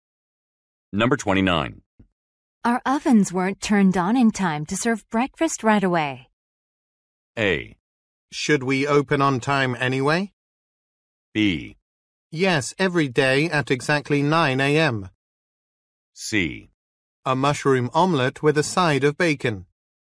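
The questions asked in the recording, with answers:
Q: Our ovens weren't turned on in time to serve breakfast right away.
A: A: Should we open on time anyway?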